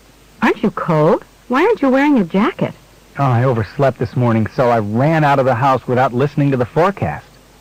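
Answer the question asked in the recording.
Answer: He didn't know it would be cold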